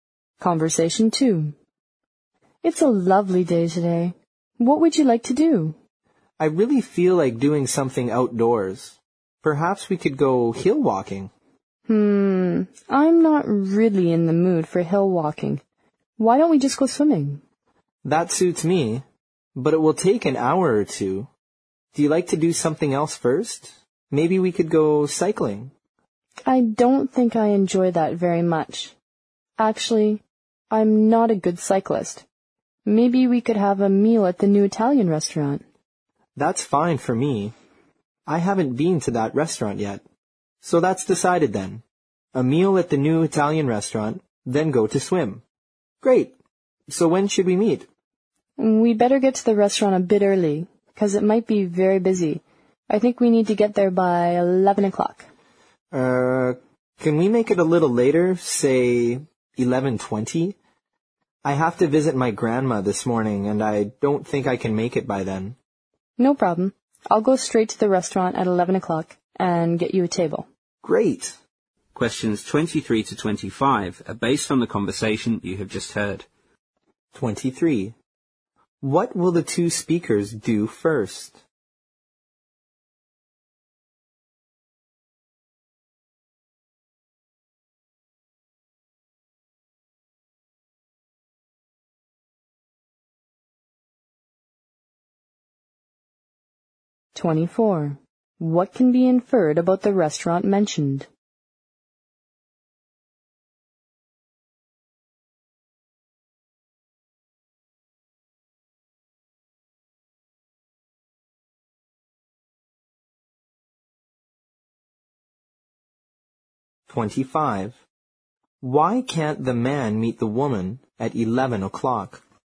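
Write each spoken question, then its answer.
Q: What will the two speakers do first?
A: Have a meal at the new Italian restaurant

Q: What can be inferred about the restaurant mentioned?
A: It might be very busy.

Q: Why can't the man meet the woman at 11 o'clock?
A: He has to visit his grandma that morning.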